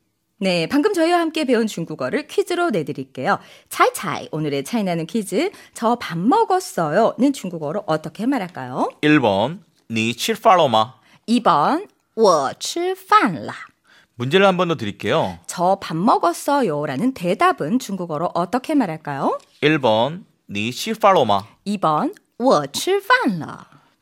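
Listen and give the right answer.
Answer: 2번: 我吃饭了.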